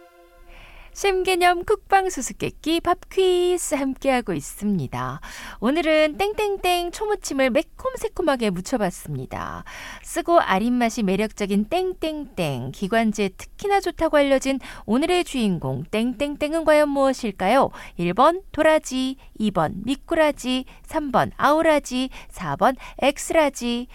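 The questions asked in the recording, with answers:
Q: 쓰고 아린맛이 매력적인 땡땡땡, 기관지에 특히나 좋다고 알려진 오늘의 주인공 땡땡땡은 과연 무엇일까요?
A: 1: 도라지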